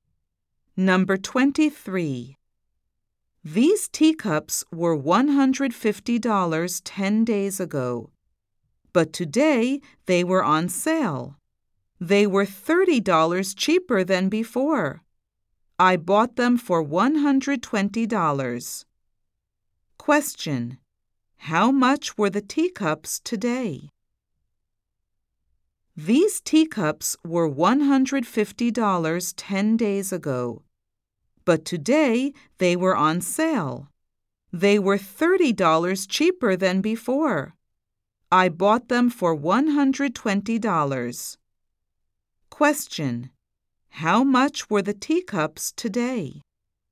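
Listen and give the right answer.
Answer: $120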